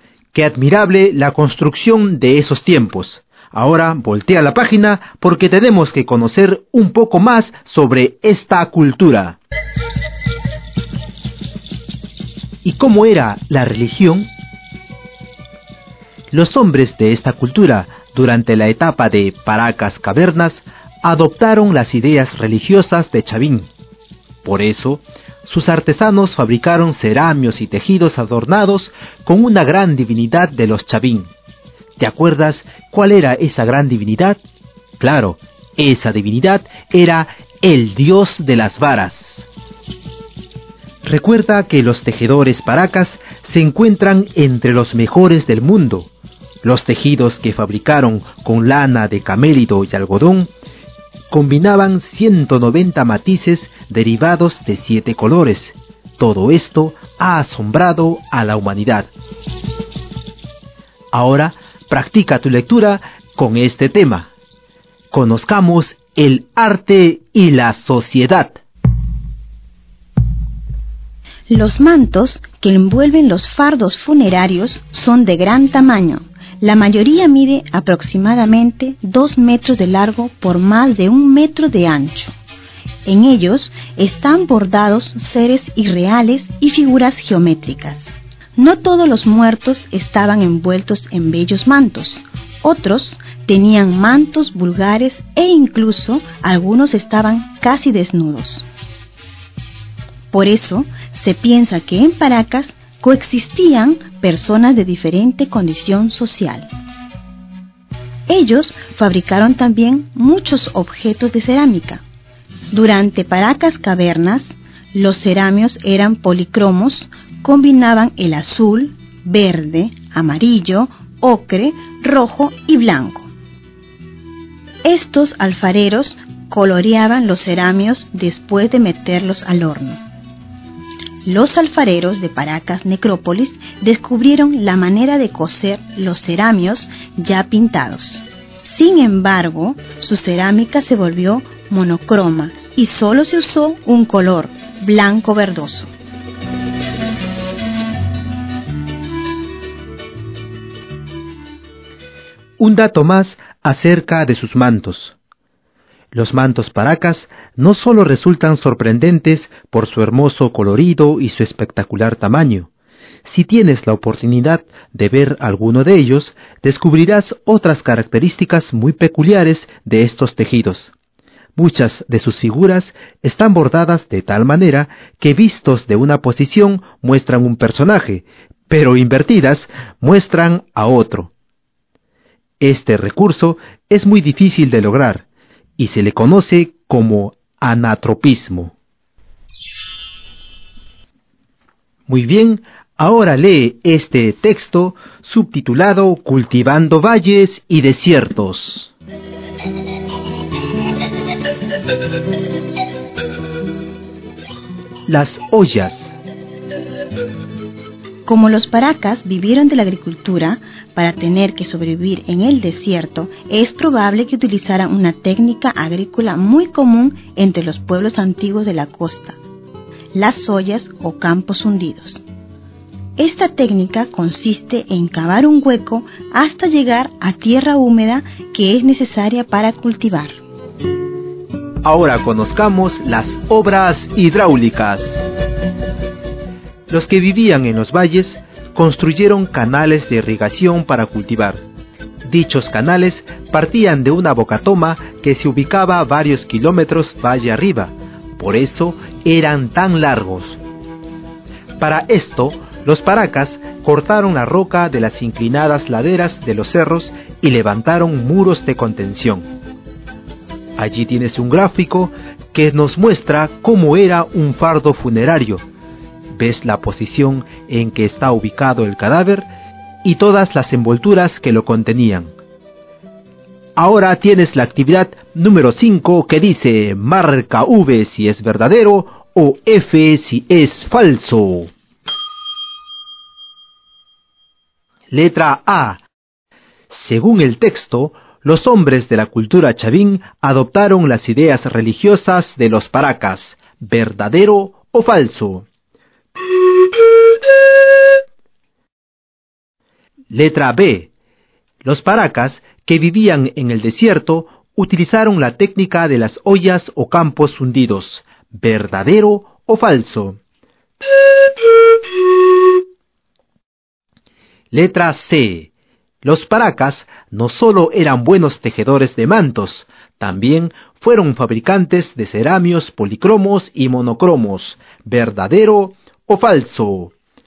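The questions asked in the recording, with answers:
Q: Según el texto, los hombres de la cultura Chavín adoptaron las ideas religiosas de los paracas, ¿verdadero o falso?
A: Falso

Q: Los paracas, que vivían en el desierto, utilizaron la técnica de las ollas o campos hundidos, ¿verdadero o falso?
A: Verdadero

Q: Los paracas no solo eran buenos tejedores de mantos, también fueron fabricantes de ceramios policromos y monocromos, ¿verdadero o falso?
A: Verdadero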